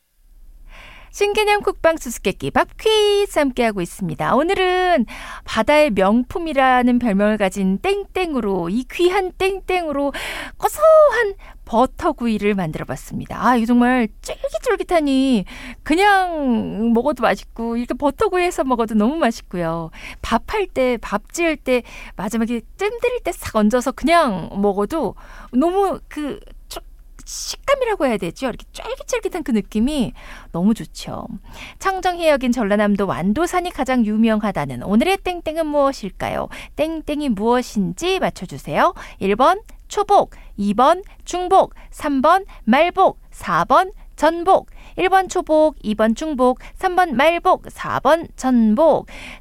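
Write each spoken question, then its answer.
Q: 청정해역인 전라남도 완도산이 가장 유명하다는 오늘의 땡땡은 무엇일까요?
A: 4: 전복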